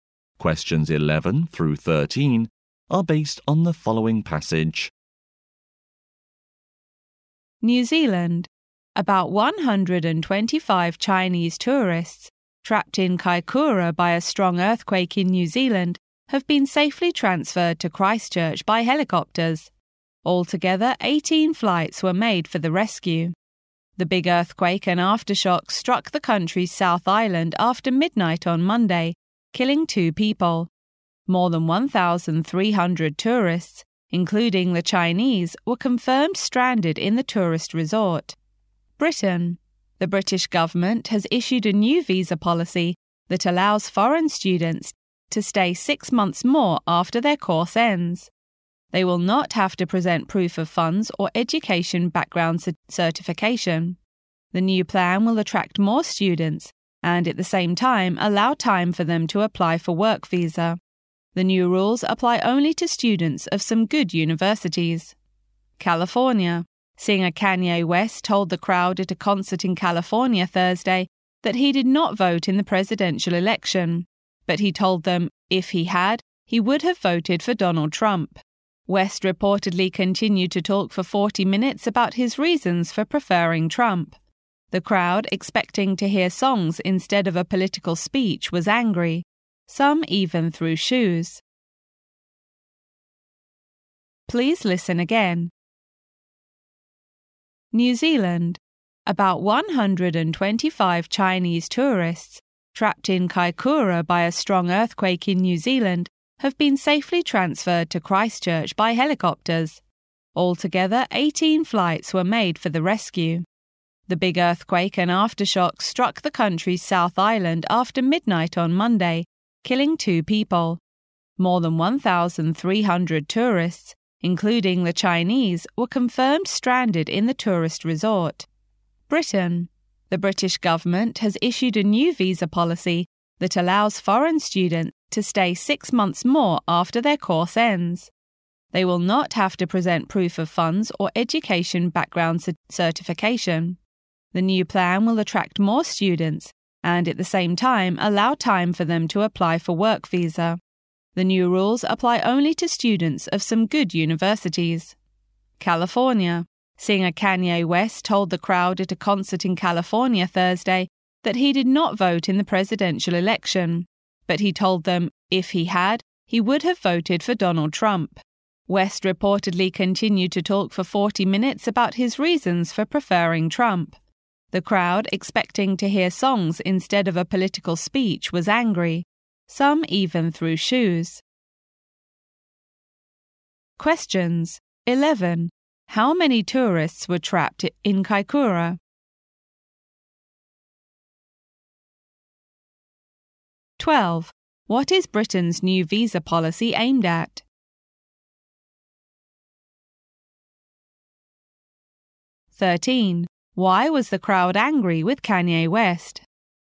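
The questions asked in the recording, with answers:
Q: What is Britain's new visa policy aimed at?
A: Attracting more foreign students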